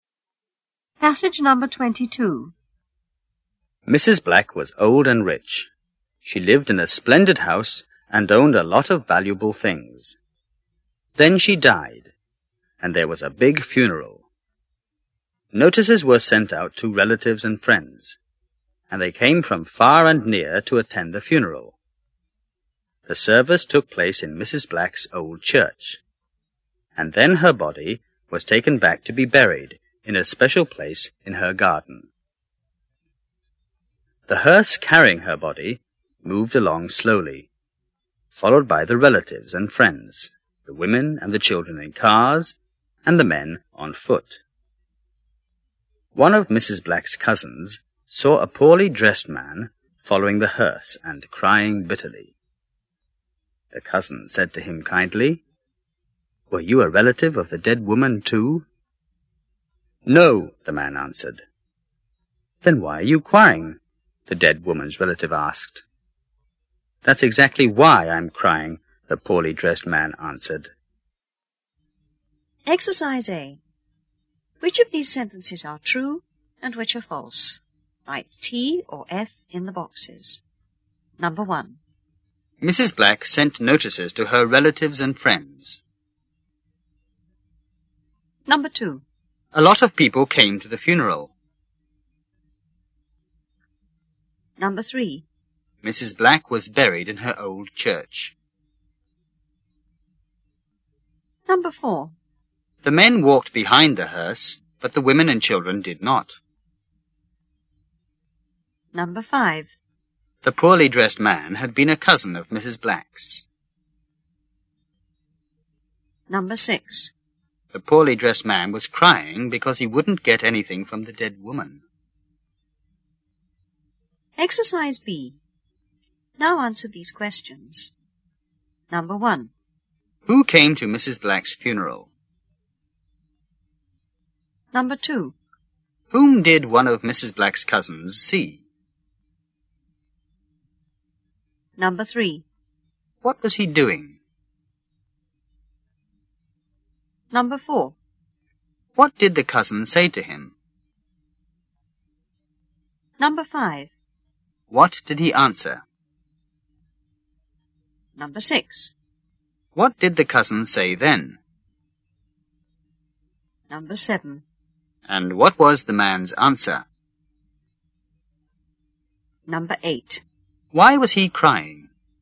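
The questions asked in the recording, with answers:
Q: Mrs. Black sent notices to her relatives and friends.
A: False

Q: A lot of people came to the funeral.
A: True

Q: Mrs. Black was buried in her old church.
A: False

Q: The poorly dressed man had been a cousin of Mrs. Black's.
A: False

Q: The poorly dressed man was crying because he wouldn't get anything from the dead woman.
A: True

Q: Who came to Mrs. Black's funeral?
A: Her relatives and friends, from far and near

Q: Whom did one of Mrs. Black's cousins see?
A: A poorly dressed man following the hearse

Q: What was he doing?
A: Following the hearse and crying bitterly

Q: What did the cousin say to him?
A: Were you a relative of the dead woman, too?

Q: What did he answer?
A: No

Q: What did the cousin say then?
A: Then why are you crying?

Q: And what was the man's answer?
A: That's exactly why I'm crying

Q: Why was he crying?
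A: Because he wasn't a relative, so he would get nothing from her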